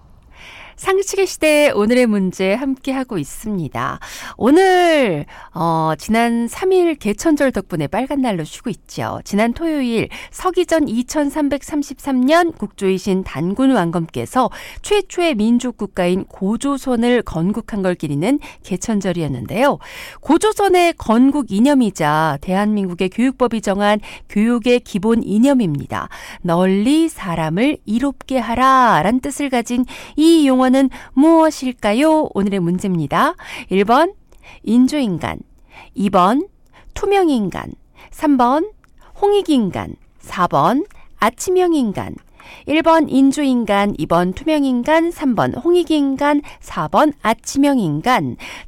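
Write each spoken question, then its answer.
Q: 널리 사람을 이롭게 하라 라는 뜻을 가진 이 용어는 무엇일까요?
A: 3번: 홍익인간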